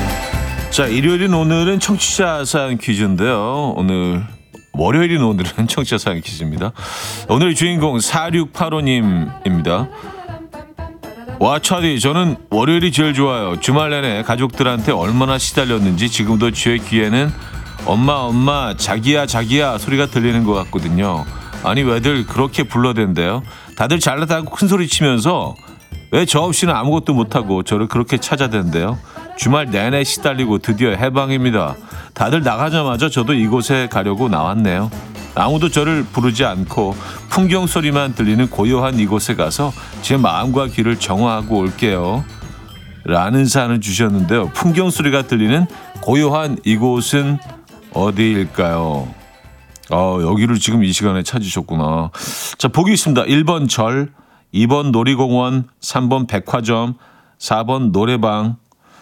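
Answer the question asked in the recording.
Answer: 1: 절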